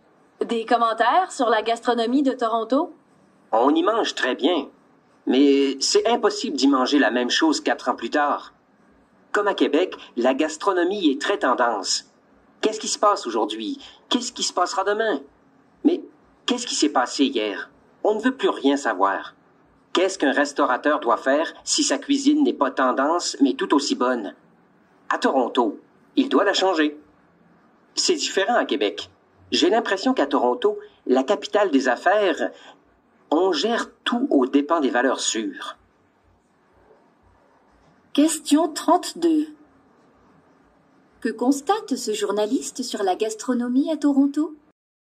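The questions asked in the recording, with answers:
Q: Que constate ce journaliste sur la gastronomie à Toronto?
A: Elle change sans cesse et suit les tendances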